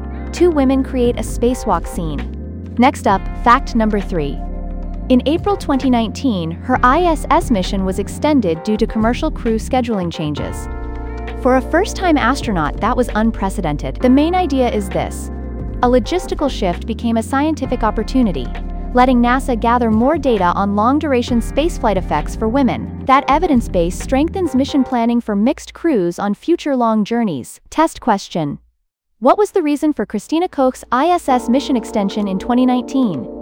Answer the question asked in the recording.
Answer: Correct answer. Commercial crew scheduling changes.